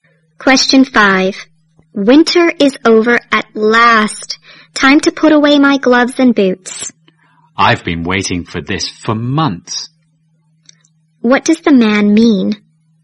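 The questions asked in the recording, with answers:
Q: What does the man mean?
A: He is glad winter is over.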